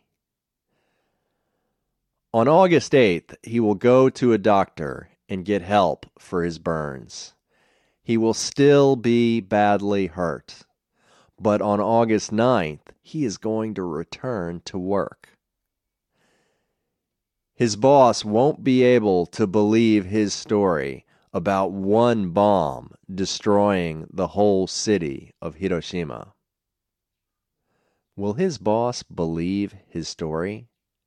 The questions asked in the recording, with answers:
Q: Will his boss believe his story?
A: No, his boss won't believe his story.